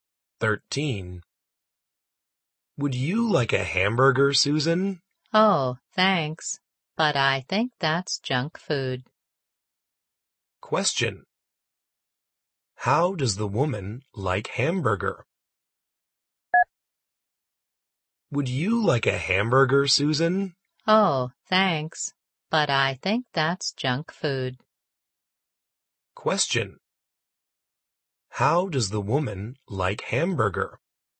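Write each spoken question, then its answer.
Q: How does the woman like hamburger?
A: She thinks it's junk food.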